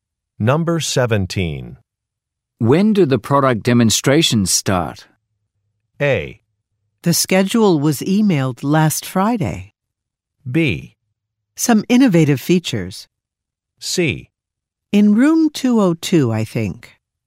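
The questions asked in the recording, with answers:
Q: When do the product demonstrations start?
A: A: The schedule was emailed last Friday.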